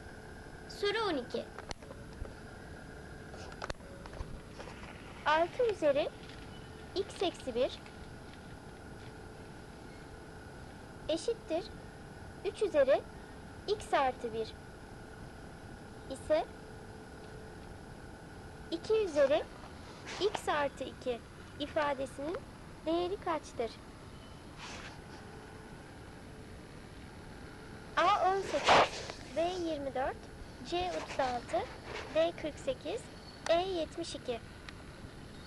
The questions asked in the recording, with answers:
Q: 2 üzeri x artı 2 ifadesinin değeri kaçtır?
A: Doğru cevap E 72.